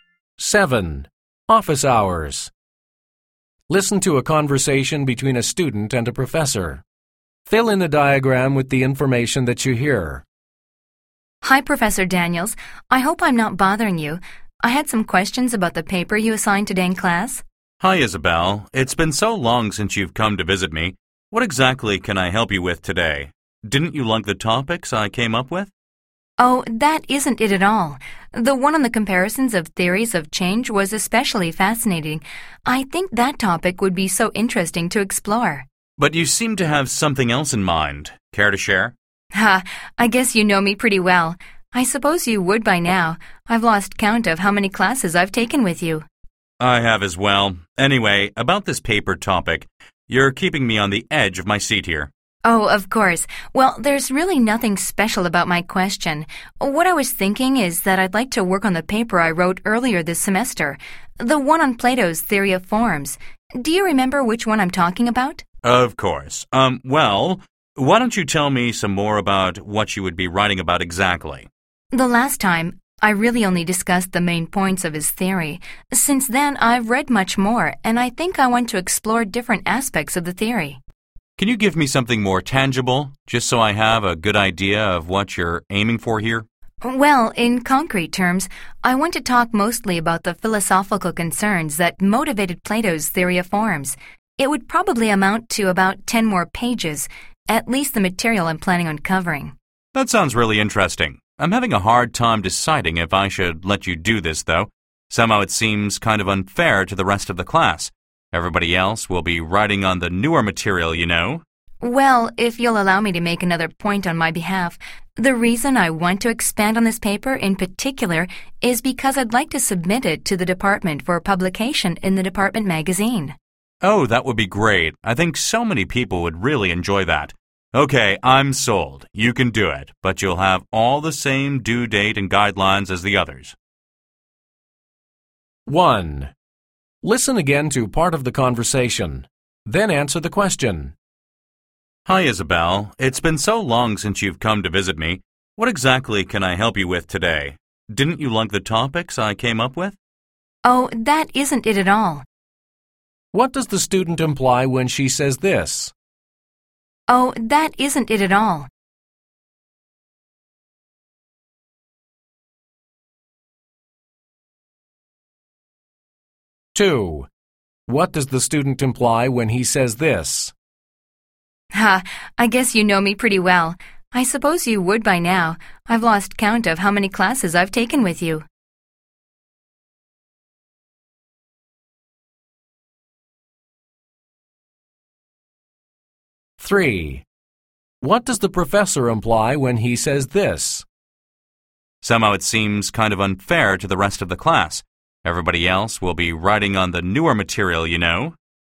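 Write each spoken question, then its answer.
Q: What does the student imply when she says this?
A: She liked the professor's topics; that is not why she came

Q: What does the student imply when he says this?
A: She has taken many classes with the professor, so he knows her well

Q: What does the professor imply when he says this?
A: He is unsure about letting her write on the old paper because it may be unfair to other students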